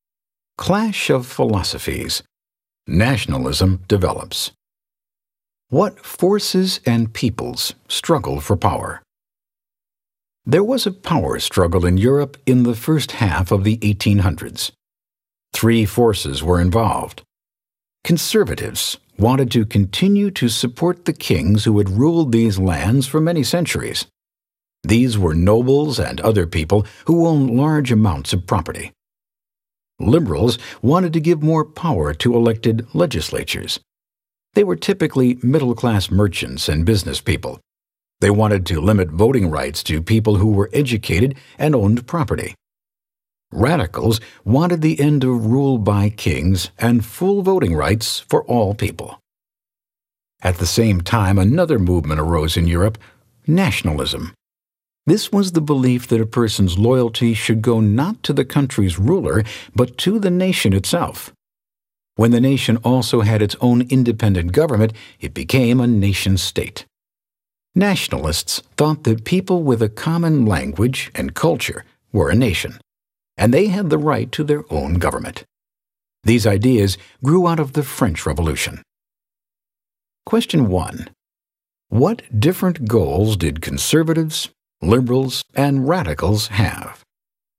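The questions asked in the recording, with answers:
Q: What different goals did conservatives, liberals, and radicals have?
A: Conservatives wanted to keep supporting kings; liberals wanted more power for elected legislatures with voting limited to educated property owners; radicals wanted to end rule by kings and give all people full voting rights.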